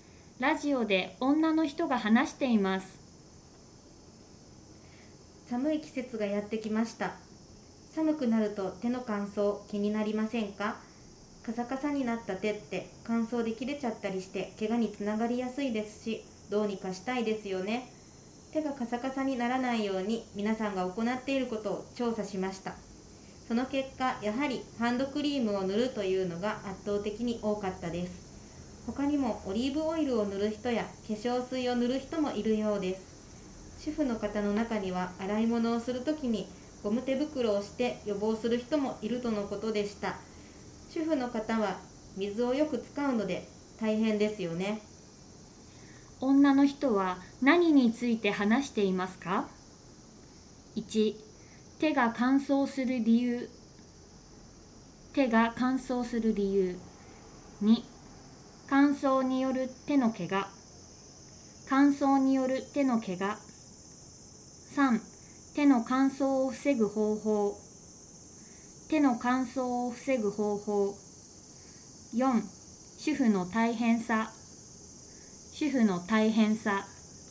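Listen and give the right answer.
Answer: 3: 手の乾燥を防ぐ方法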